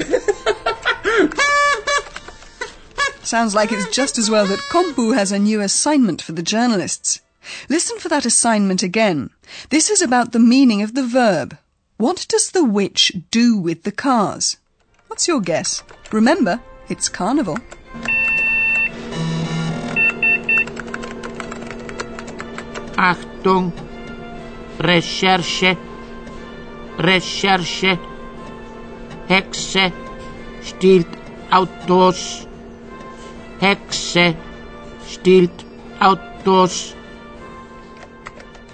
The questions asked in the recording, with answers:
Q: What does the witch do with the cars?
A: This witch is exploiting the carnival fancy dress to steal cars.